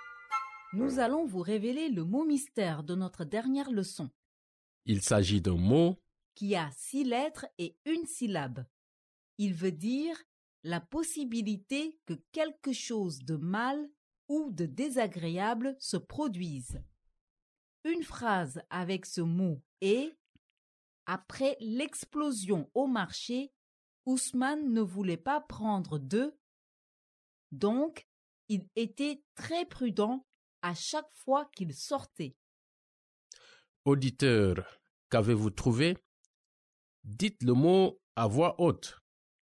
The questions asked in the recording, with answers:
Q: Auditeur, qu'avez-vous trouvé?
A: Le mot mystère d'aujourd'hui est risque.